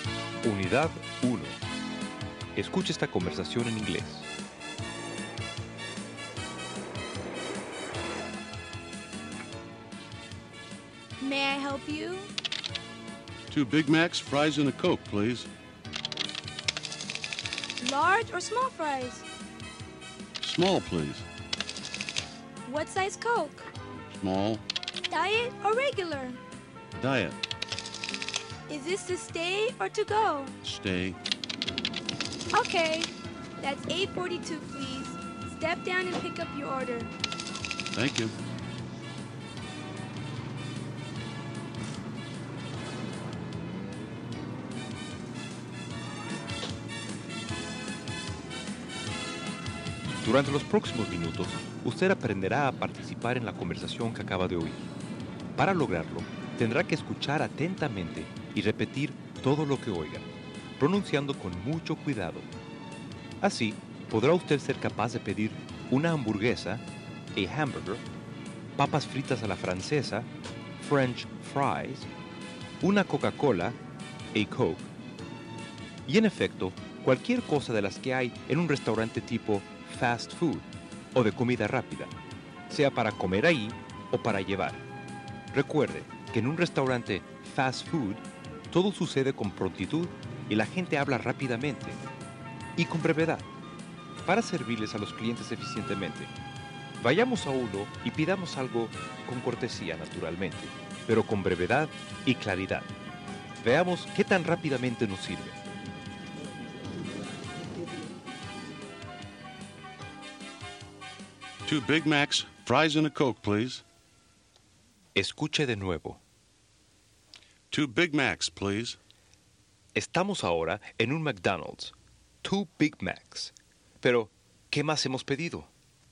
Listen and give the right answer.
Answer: Fries and a Coke.